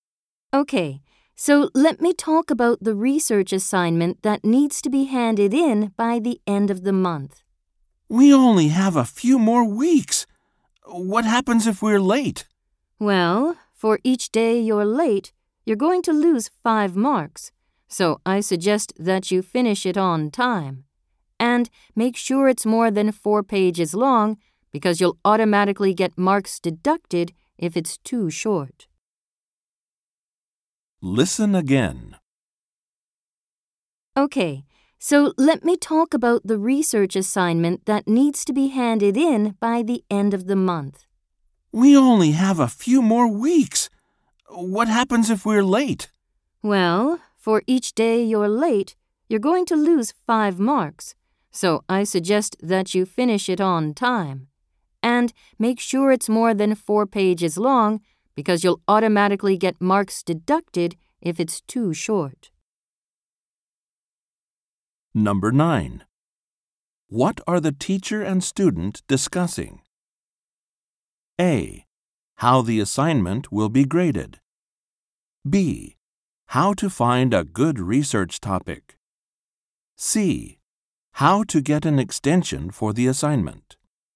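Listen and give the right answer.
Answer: A: How the assignment will be graded.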